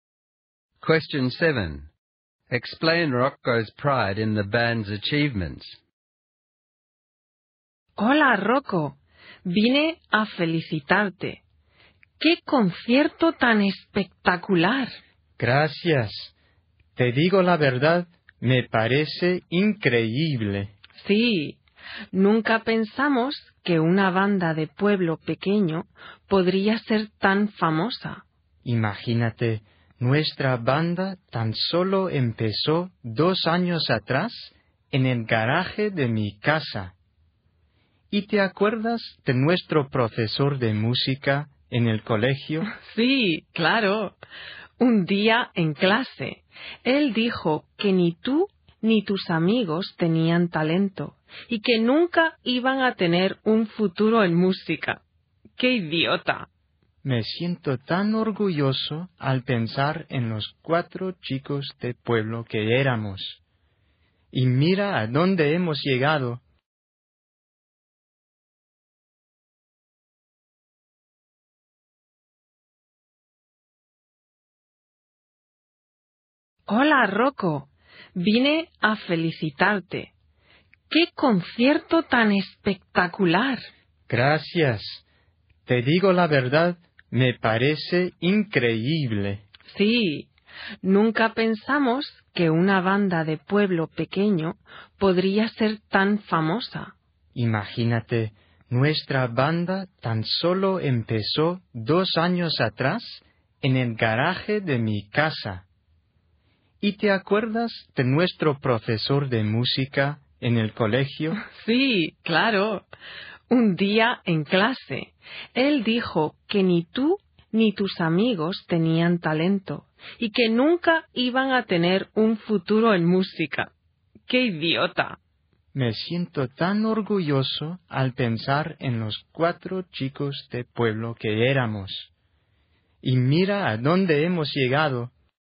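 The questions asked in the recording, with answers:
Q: Explain Rocco's pride in the band's achievements.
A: The band of four small-town boys started in his garage just two years ago and became famous, even though their music teacher said they had no talent and no future in music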